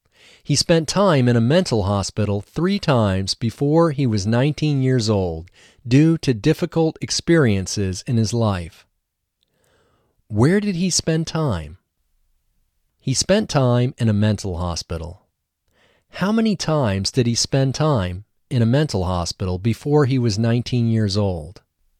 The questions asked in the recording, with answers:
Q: How many times did he spend time in a mental hospital before he was 19 years old?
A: He spent time in a mental hospital 3 times before he was 19 years old.